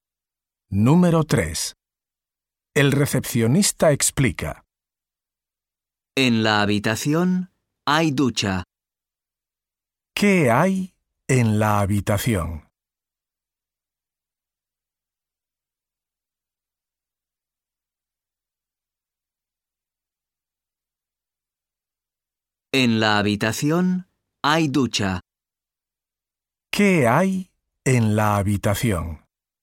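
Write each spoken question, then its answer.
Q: ¿Qué hay en la habitación?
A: Ducha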